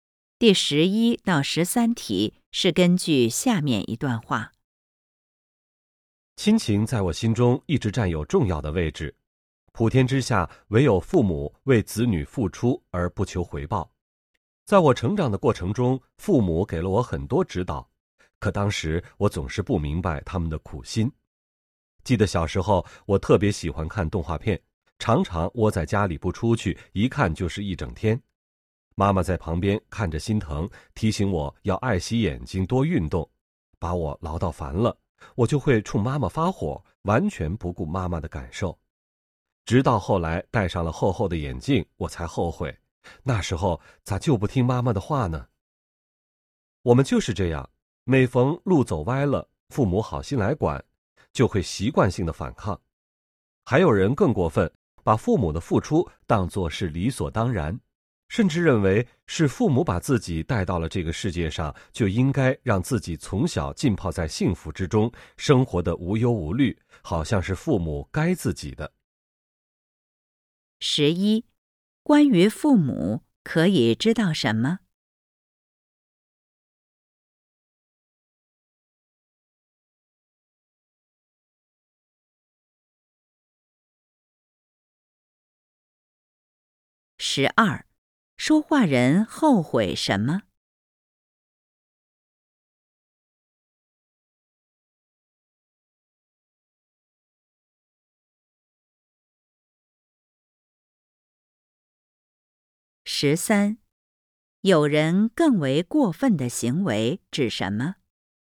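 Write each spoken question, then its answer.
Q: 关于父母可以知道什么?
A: 父母为子女付出而不求回报

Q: 说话人后悔什么?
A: 小时候不听妈妈的话,只顾看动画片,后来戴上了厚眼镜

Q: 有人更为过分的行为指什么?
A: 把父母的付出当作理所当然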